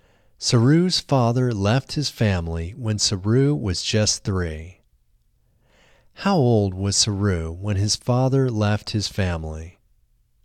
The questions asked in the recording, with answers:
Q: How old was Saru when his father left his family?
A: Saru was just 3 when his father left his family.